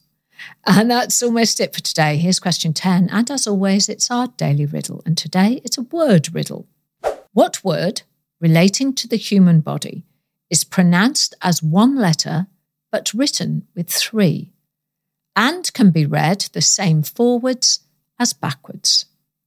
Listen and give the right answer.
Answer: And the answer, of course, I was looking for was the I-E-Y-E.